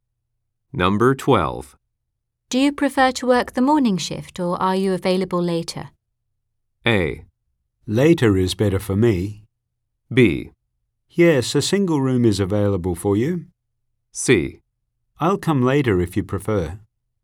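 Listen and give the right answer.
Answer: A: Later is better for me.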